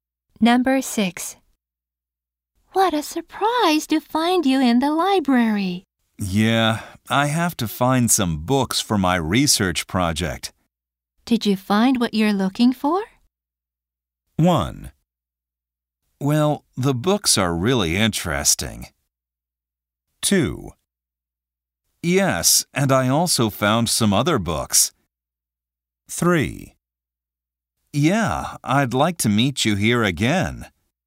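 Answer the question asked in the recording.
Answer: 2: Yes, and I also found some other books.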